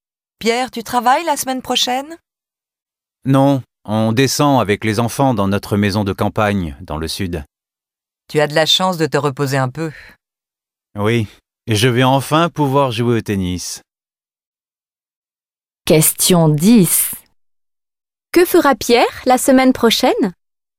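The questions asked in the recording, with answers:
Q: Que fera Pierre la semaine prochaine?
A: Il partira avec ses enfants dans sa maison de campagne dans le sud et jouera au tennis.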